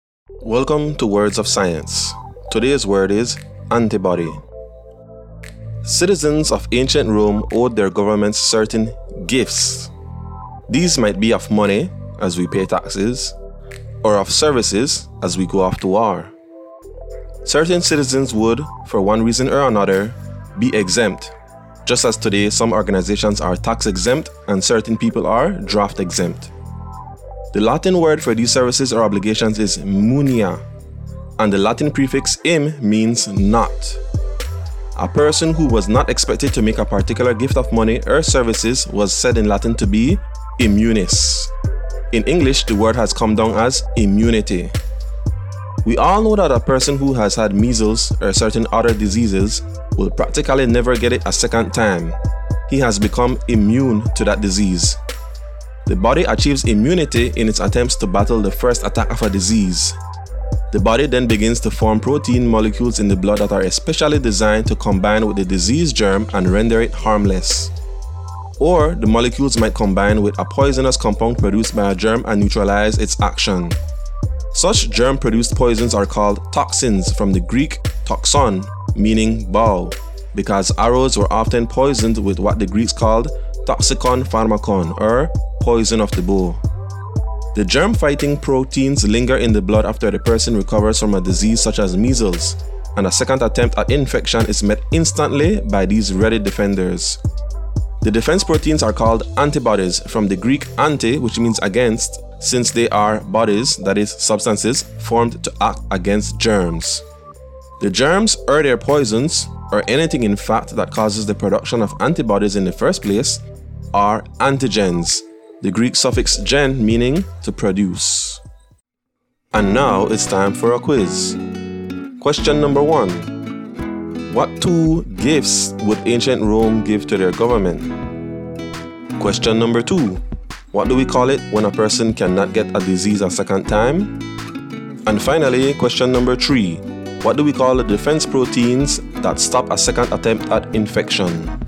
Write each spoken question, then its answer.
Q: What two gifts would ancient Rome give to their government?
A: money and services

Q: What do we call it when a person cannot get a disease a second time?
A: the answer is immunity

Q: What do we call the defense proteins that stop a second attempt at infection?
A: the answer is antibodies